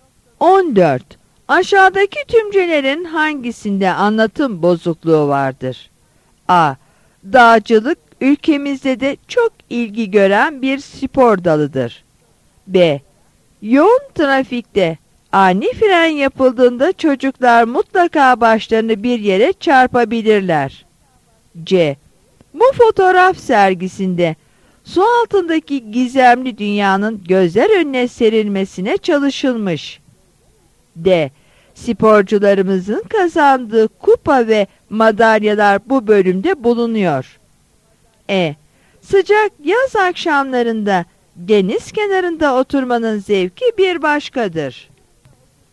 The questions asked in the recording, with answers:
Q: Aşağıdaki tümcelerin hangisinde anlatım bozukluğu vardır?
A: Yanıt B'dir.